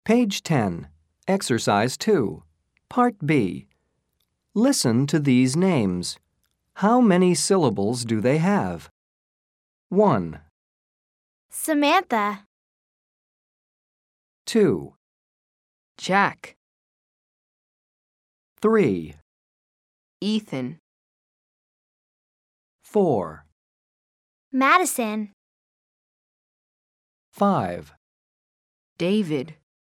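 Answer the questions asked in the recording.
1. 3 syllables
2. 1 syllable
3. 2 syllables
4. 3 syllables
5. 2 syllables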